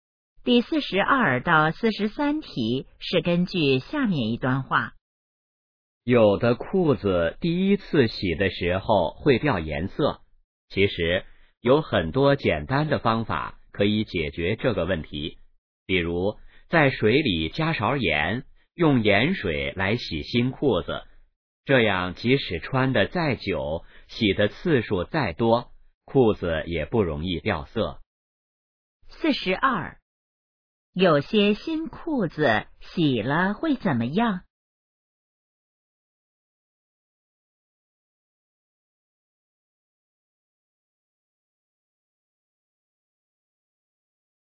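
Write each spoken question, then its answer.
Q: 有些新裤子洗了会怎么样?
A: 掉颜色

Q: 怎样解决这个问题?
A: 用盐水洗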